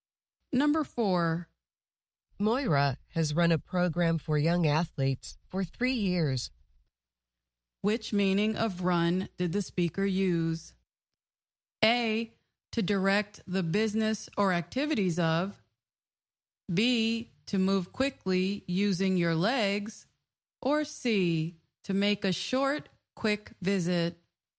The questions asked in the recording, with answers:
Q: Which meaning of run did the speaker use?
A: The answer is A, to direct the business or activities of.